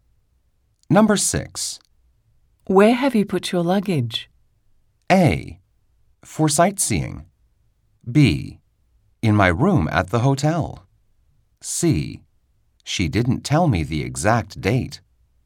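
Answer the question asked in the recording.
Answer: B: In my room at the hotel.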